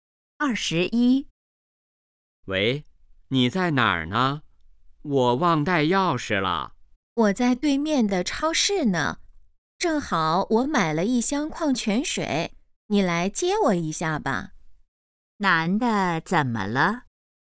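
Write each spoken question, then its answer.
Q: 男的怎么了?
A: 忘带钥匙了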